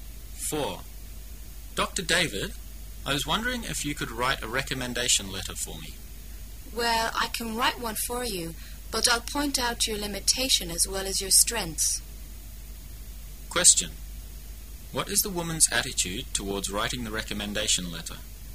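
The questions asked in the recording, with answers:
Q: What is the woman's attitude towards writing the recommendation letter?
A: She is willing to write it but will give an honest assessment, including limitations

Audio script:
[解析] M:Dr. David, I was wondering if you could write a recommendation letter for me. W: Well, I can write one for you. But I'll point out your limitation as well as your strength. Q: What is the woman's attitude towards writing the recommendation letter?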